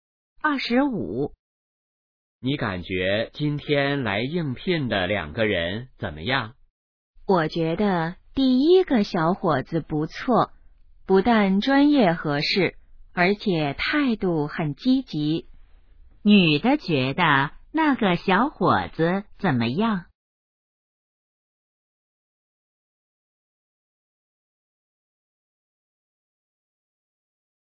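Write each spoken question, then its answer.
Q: 女的觉得那个小伙子怎么样?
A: 不错,专业合适,态度积极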